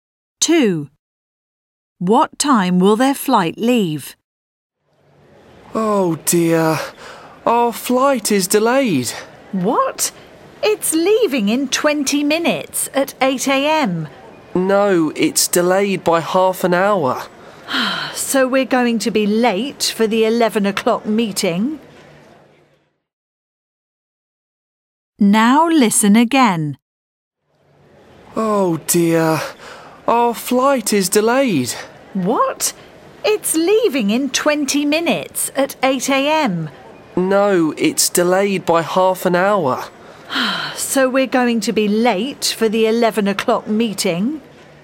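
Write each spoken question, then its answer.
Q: What time will their flight leave?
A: 8:30 a.m.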